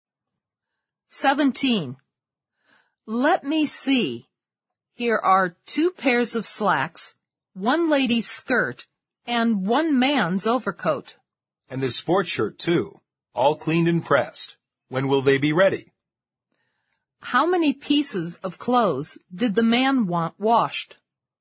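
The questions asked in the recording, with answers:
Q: How many pieces of clothes did the man want washed?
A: Five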